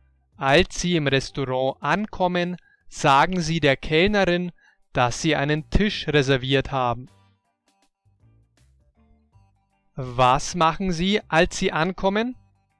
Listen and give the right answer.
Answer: Sie sagen der Kellnerin, dass Sie einen Tisch reserviert haben.